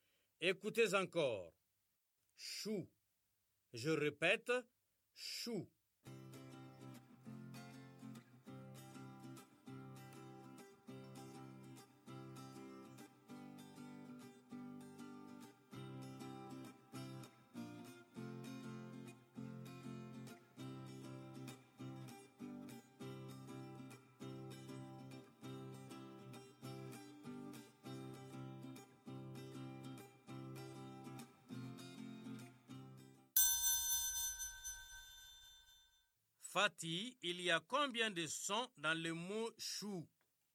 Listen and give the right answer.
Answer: Ch. Ou. Monsieur, 2 sons.